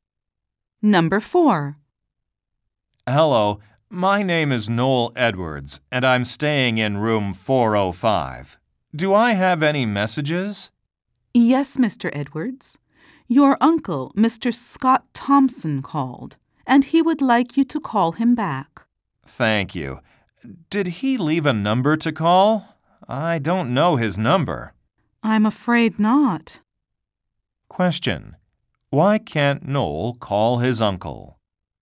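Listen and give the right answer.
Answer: He doesn't know his number and the uncle left none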